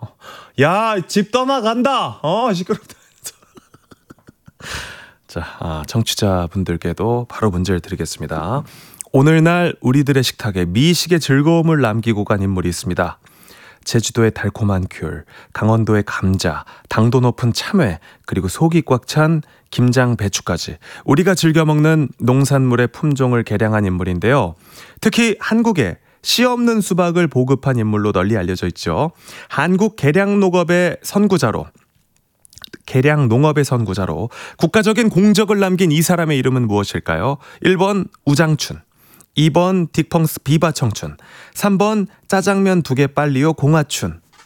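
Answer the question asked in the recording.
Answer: 1: 우장춘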